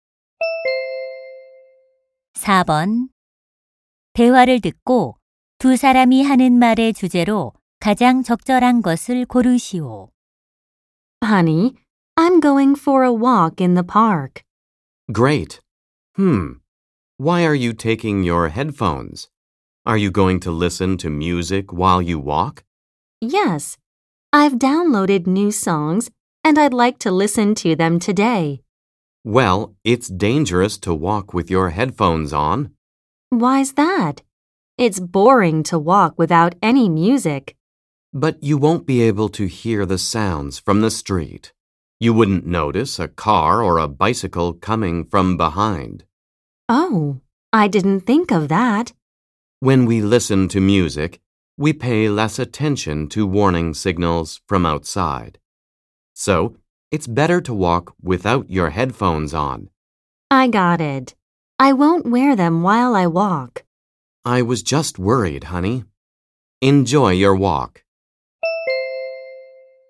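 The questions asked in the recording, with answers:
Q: 대화를 듣고 두 사람이 하는 말의 주제로 가장 적절한 것을 고르시오.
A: 헤드폰을 끼고 걷는 것의 위험성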